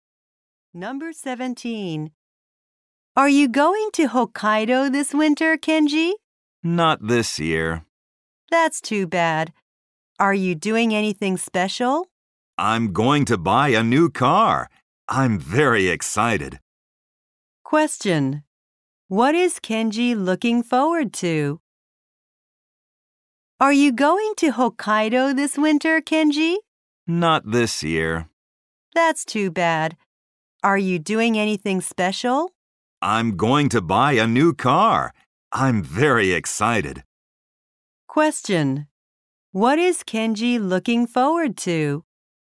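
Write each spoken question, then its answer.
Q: What is Kenji looking forward to?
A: Buying a new car.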